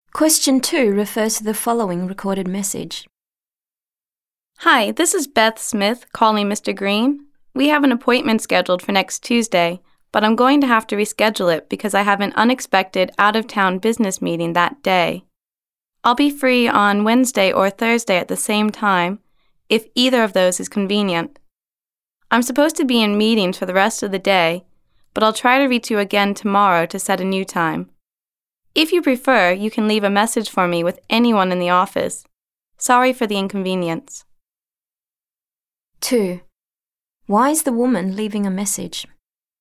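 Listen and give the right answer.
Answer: To reschedule her appointment with Mr. Green because she has an unexpected out-of-town business meeting that day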